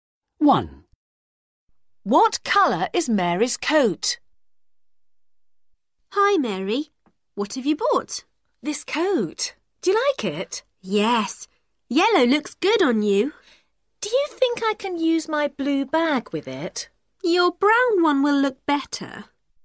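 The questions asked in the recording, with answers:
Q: What colour is Mary's coat?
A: Yellow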